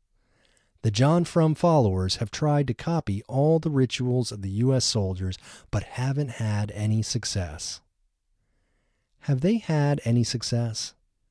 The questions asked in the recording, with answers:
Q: Have they had any success?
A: No, they haven't had any success.